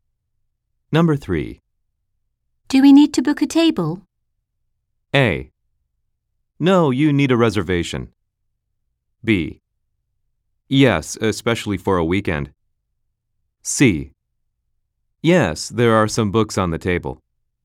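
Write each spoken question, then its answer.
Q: Do we need to book a table?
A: B: Yes, especially for a weekend.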